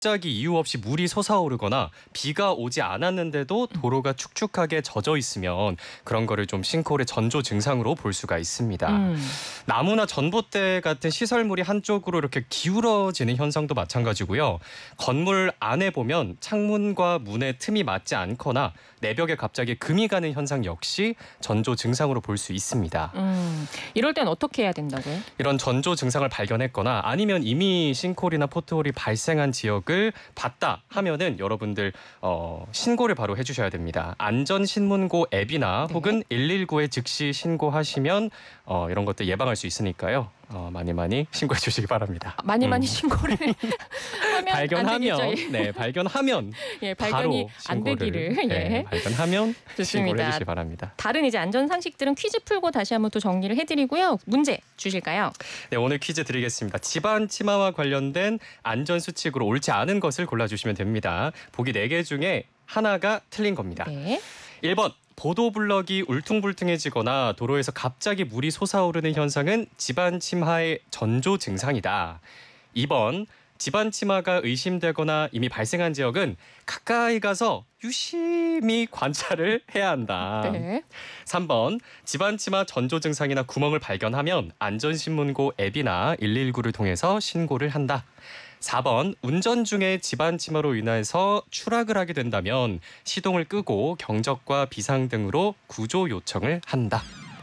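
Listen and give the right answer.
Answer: 2번: 집안 침하가 의심되거나 이미 발생한 지역은 가까이 가서 유심히 관찰을 해야 한다.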